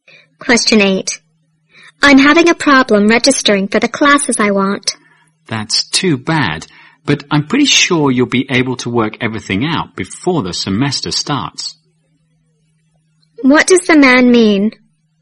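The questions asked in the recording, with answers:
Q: What does the man mean?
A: The woman will sort out her registration problem before the semester starts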